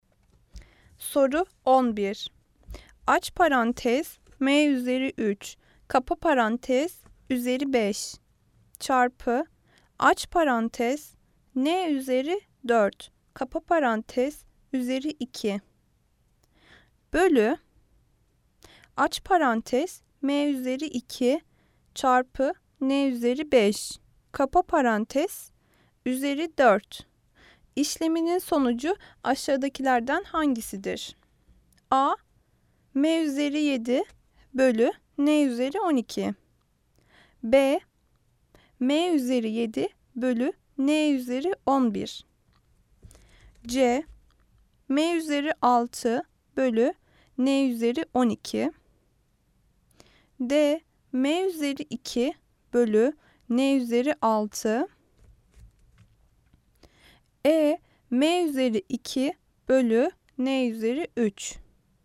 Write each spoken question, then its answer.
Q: İşleminin sonucu aşağıdakilerden hangisidir?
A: Cevap, Adana, M üzeri 7 bölü N üzeri 12.